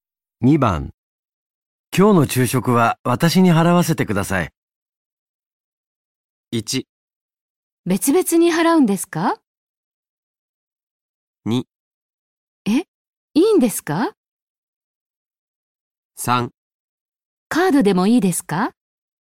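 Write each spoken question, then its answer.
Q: 今日の昼食は私に払わせてください。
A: 2: え、いいんですか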